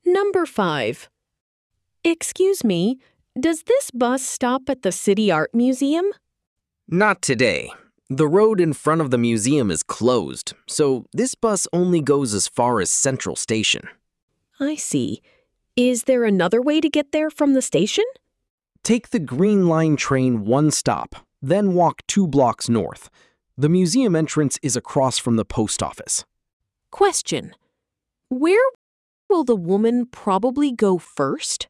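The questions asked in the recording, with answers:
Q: where will the woman probably go first?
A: Central Station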